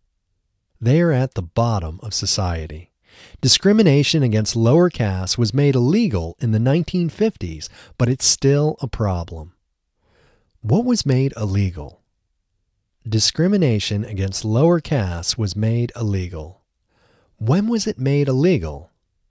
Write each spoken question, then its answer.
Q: When was it made illegal?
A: It was made illegal in the 1950s.